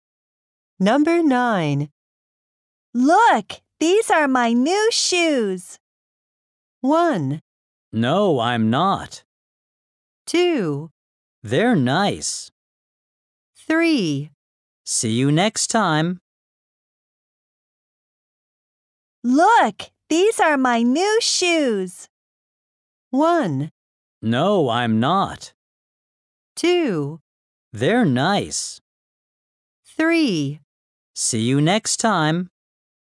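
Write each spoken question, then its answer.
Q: Look, these are my new shoes.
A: 2: They're nice.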